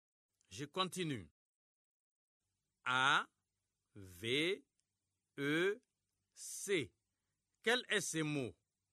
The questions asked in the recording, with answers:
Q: A, V, E, C. Quel est ce mot?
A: J'espère que vous avez trouvé avec.